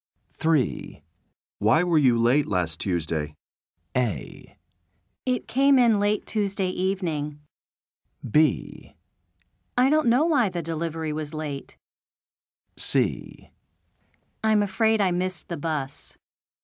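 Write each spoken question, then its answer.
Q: Why were you late last Tuesday?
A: C: I'm afraid I missed the bus.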